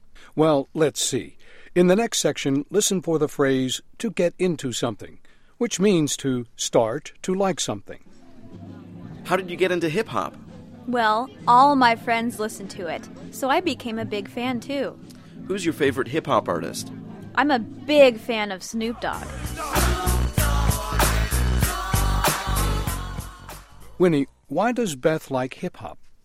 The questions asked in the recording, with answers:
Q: Winnie, why does Beth like hip-hop?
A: 她说她喜欢上嘻哈乐啊,是因为她的朋友都爱听这种音乐